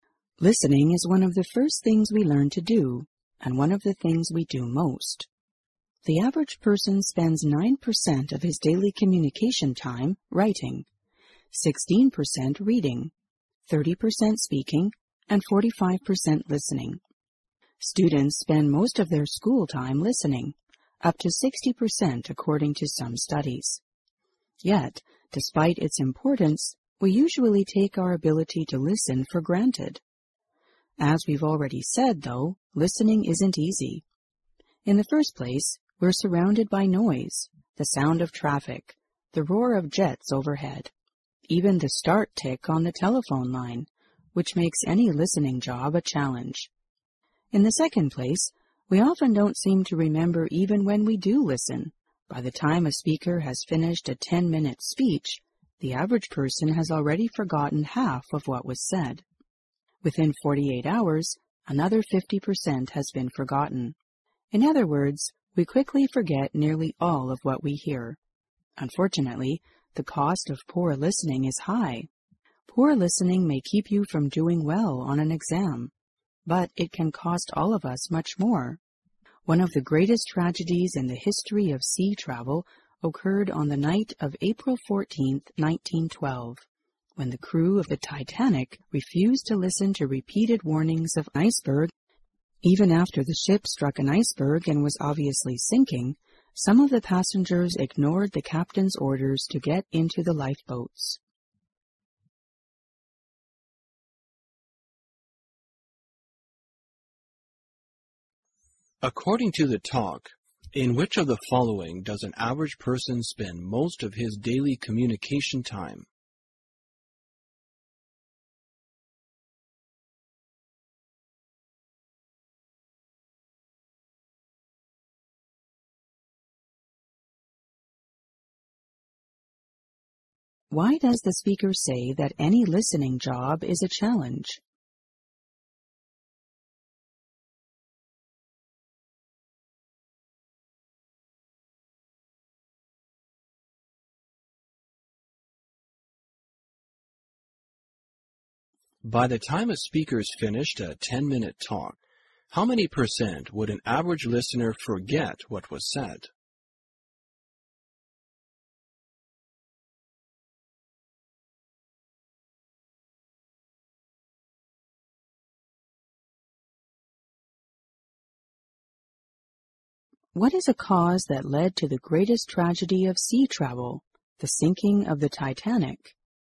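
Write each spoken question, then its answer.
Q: According to the talk, in which of the following does an average person spend most of his daily communication time?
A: Listening

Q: Why does the speaker say that any listening job is a challenge?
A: Because we're surrounded by noise

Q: By the time a speaker's finished a 10-minute talk, how many percent would an average listener forget what was said?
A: 50%

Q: What is a cause that led to the greatest tragedy of sea travel, the sinking of the Titanic?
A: The crew refused to listen to repeated warnings of icebergs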